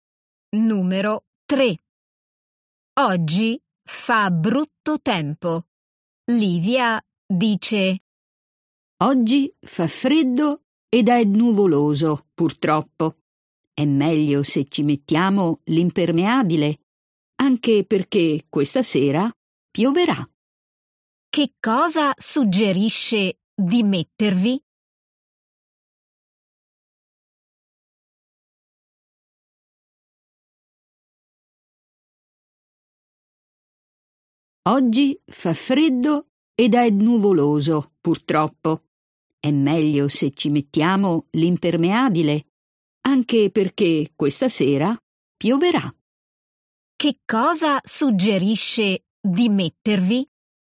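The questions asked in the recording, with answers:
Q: Che cosa suggerisce di mettervi?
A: L'impermeabile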